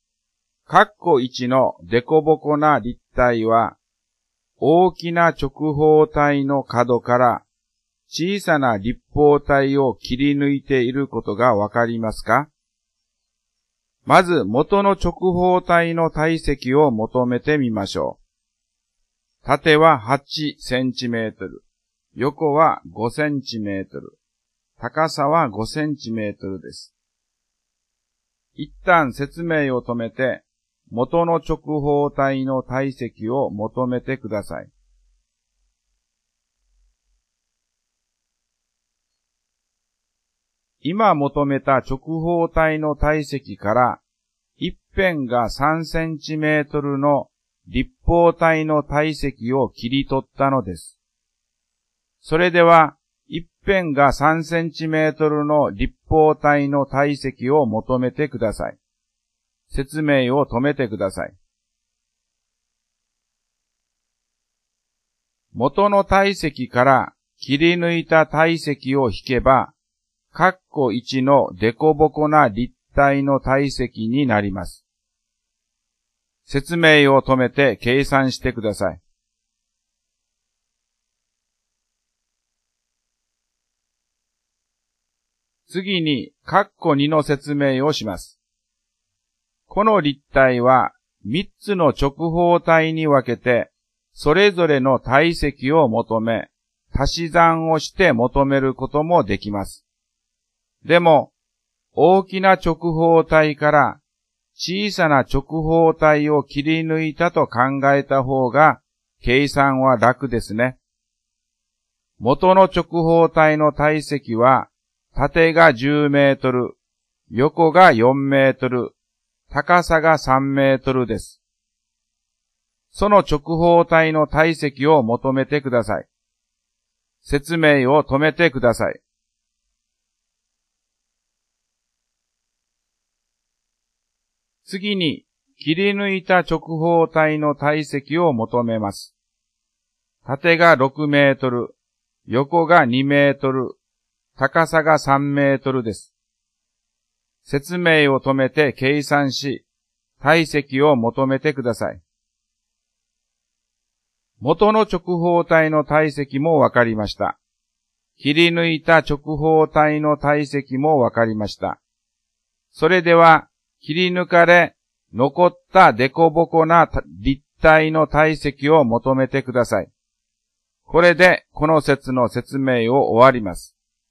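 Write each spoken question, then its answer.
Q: 一旦説明を止めて、元の直方体の体積を求めてください。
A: 200立方センチメートル

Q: それでは、一辺が3センチメートルの立方体の体積を求めてください。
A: 27立方センチメートル

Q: 説明を止めて計算してください。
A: 173立方センチメートル

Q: その直方体の体積を求めてください。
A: 120立方メートル

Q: 説明を止めて計算し、体積を求めてください。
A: 36立方メートル

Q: それでは、切り抜かれ、残ったデコボコな立体の体積を求めてください。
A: 84立方メートル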